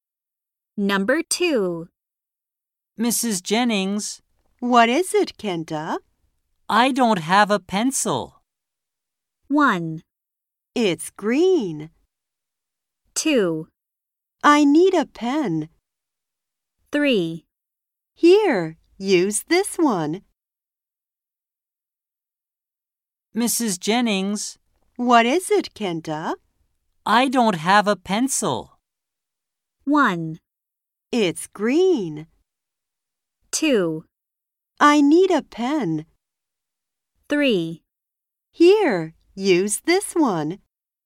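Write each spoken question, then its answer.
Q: I don't have a pencil.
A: 3: Here, use this one.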